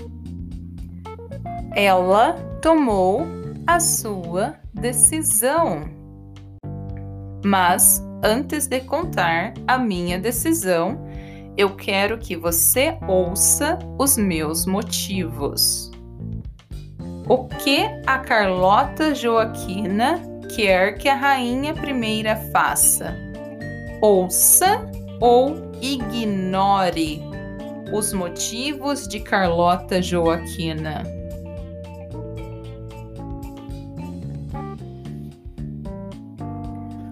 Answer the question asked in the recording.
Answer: ouça. Ela quer que a rainha Maria I ouça os seus motivos.